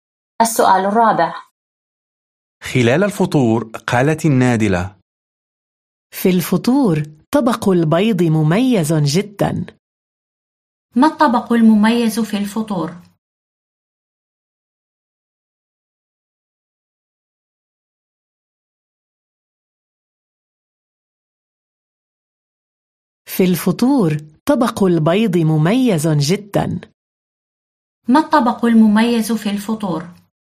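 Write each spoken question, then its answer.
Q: ما الطبق المميز في الفطور؟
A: طبق البيض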